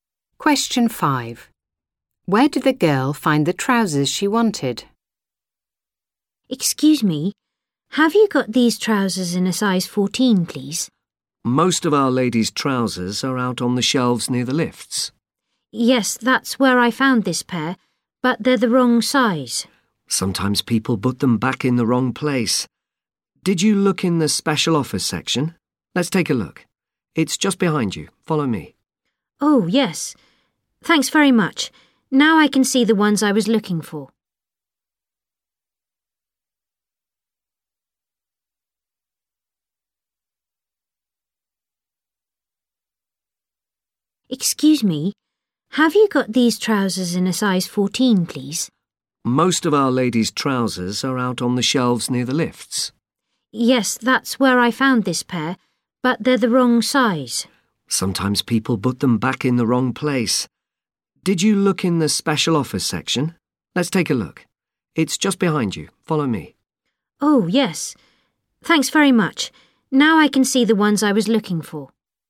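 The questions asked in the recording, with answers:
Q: Where did the girl find the trousers she wanted?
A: In the special offers section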